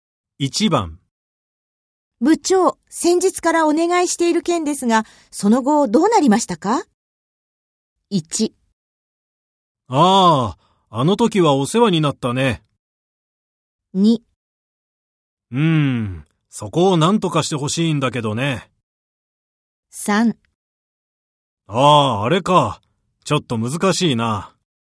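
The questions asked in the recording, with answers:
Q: 部長、先日からお願いしている件ですが、その後どうなりましたか?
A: 3: ああ、あれか。ちょっと難しいな。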